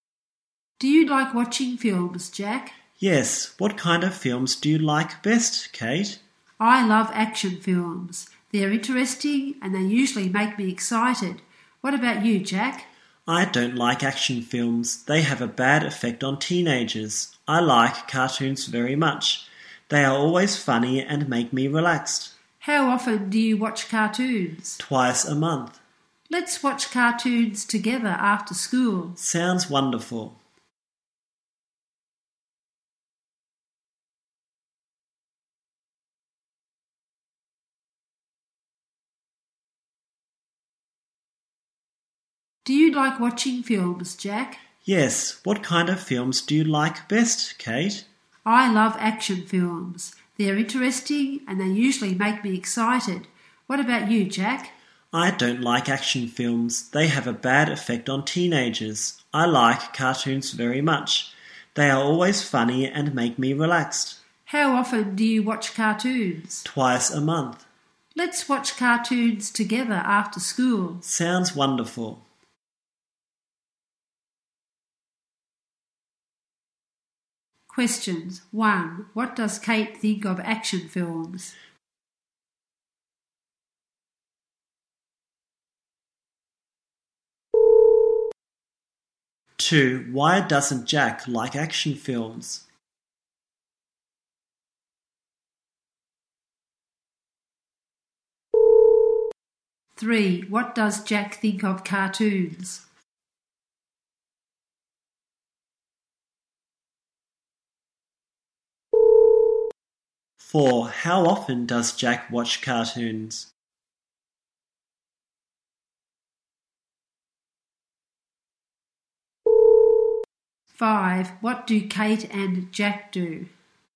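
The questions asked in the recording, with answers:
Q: What does Kate think of action films?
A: Interesting and exciting

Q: Why doesn't Jack like action films?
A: They have a bad effect on teenagers

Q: What does Jack think of cartoons?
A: Funny and relaxing

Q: How often does Jack watch cartoons?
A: Twice a month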